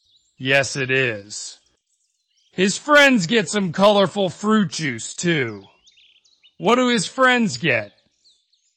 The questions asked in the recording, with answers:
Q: What do his friends get?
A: They get some fruit juice, too.